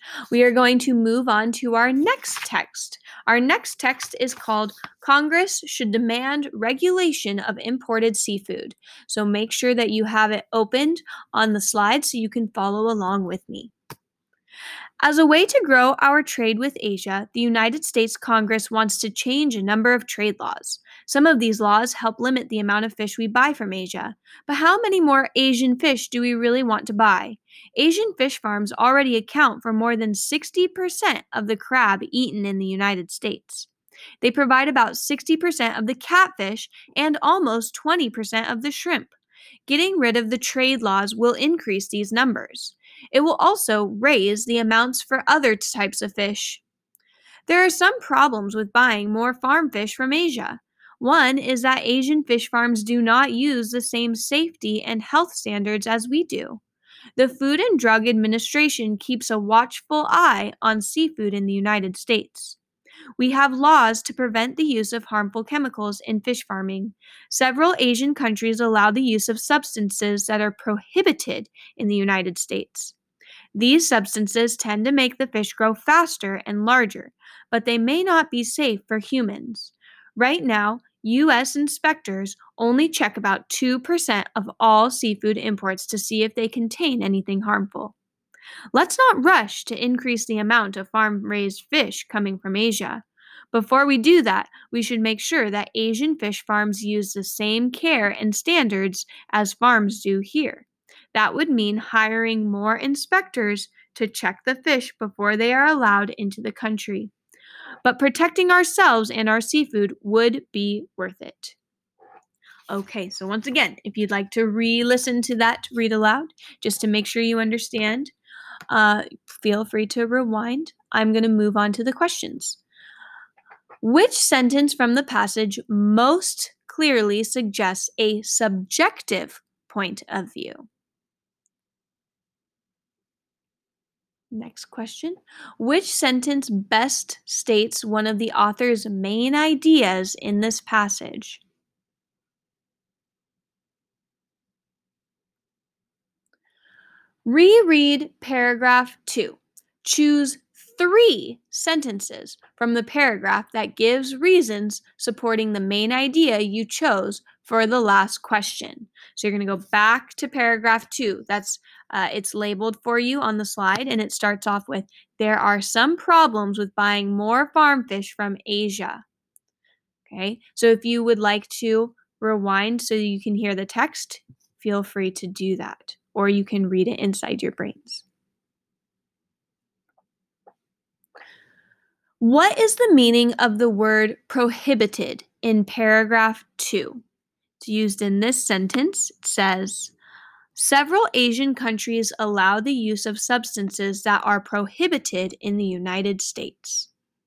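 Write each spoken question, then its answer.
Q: What is the meaning of the word prohibited in paragraph 2?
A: not allowed; forbidden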